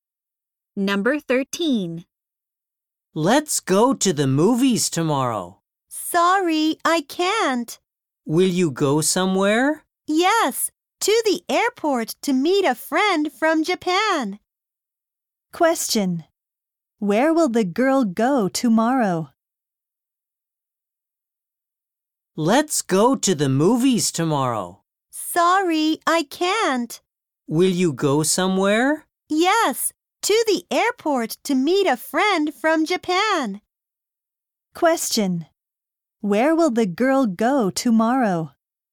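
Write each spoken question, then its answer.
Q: Where will the girl go tomorrow?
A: To the airport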